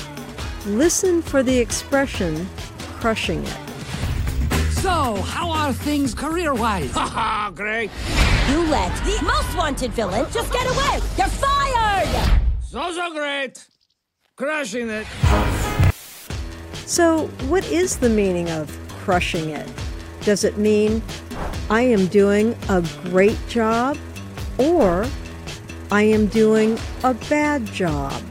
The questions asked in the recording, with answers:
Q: Does it mean I am doing a great job, or I am doing a bad job?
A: Crushing it means I am doing a great job.